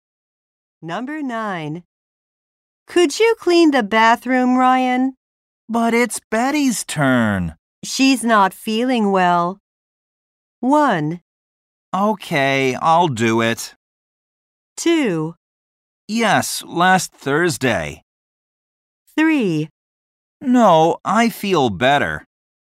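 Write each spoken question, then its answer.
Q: She's not feeling well.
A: 1: Okay, I'll do it.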